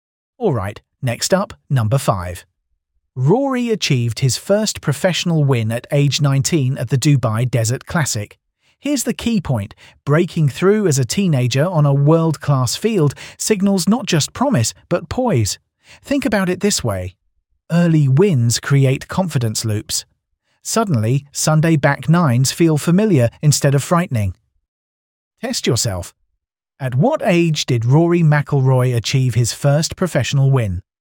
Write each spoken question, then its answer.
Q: At what age did Rory McIlroy achieve his first professional win?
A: Correct answer, 19.